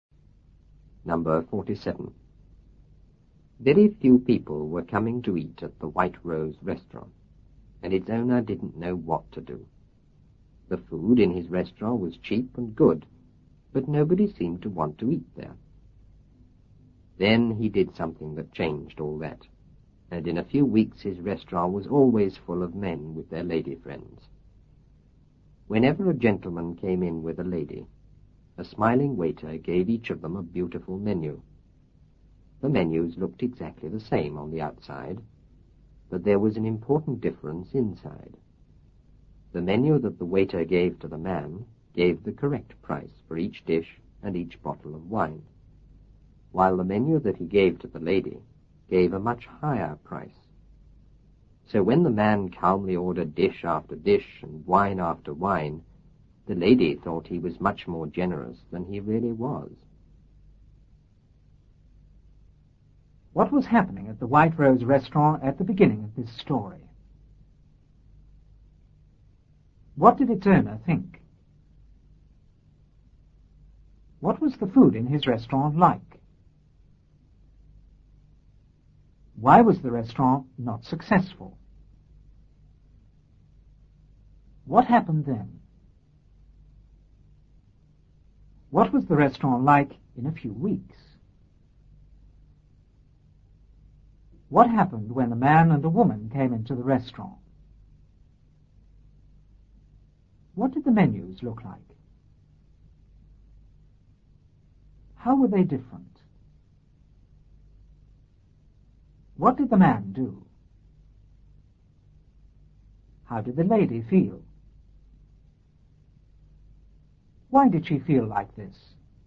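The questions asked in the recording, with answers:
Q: What was happening at the White Rose restaurant at the beginning of this story?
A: Very few people were coming to eat there

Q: What did its owner think?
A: He didn't know what to do

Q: What was the food in his restaurant like?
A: Cheap and good

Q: What happened then?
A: The owner did something that changed all that

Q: What was the restaurant like in a few weeks?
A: Always full of men with their lady friends

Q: What happened when the man and the woman came into the restaurant?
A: A smiling waiter gave each of them a beautiful menu

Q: What did the menus look like?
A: Exactly the same on the outside

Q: How were they different?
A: The man's menu had the correct prices; the lady's had much higher prices

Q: What did the man do?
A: He calmly ordered dish after dish and wine after wine

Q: How did the lady feel? Why did she feel like this?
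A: She thought he was much more generous than he really was, because her menu showed higher prices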